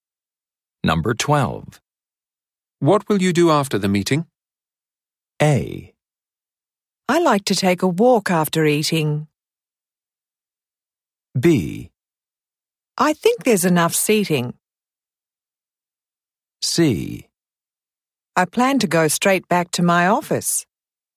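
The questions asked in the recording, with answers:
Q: What will you do after the meeting?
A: C: I plan to go straight back to my office.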